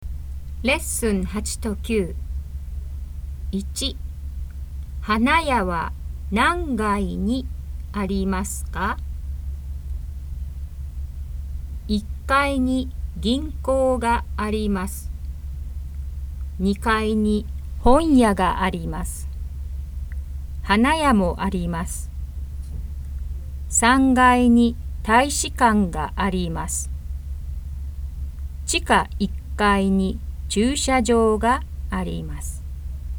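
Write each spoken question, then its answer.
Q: 花屋は何階にありますか?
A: 2階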